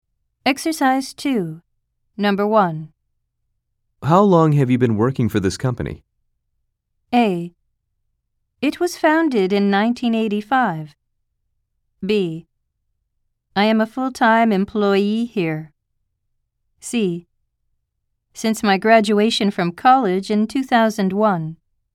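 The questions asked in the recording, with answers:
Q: How long have you been working for this company?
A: C: Since my graduation from college in 2001.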